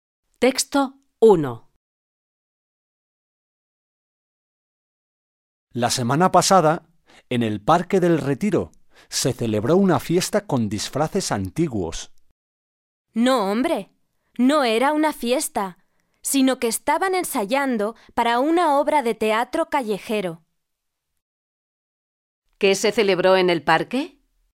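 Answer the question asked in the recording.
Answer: Nada; ensayaban una obra de teatro callejero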